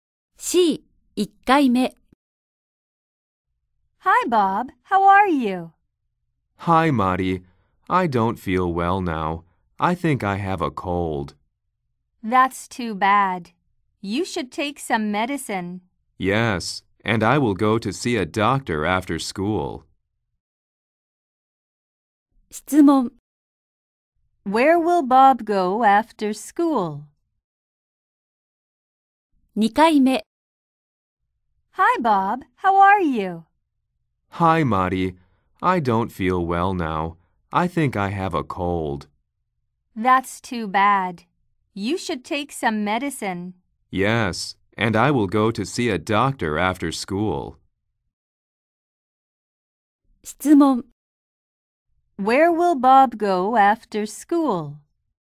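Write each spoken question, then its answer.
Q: Where will Bob go after school?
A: To see a doctor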